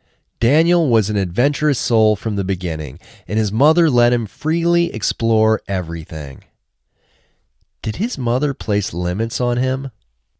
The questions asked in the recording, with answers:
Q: Did his mother place limits on him?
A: No, she didn't place limits on him.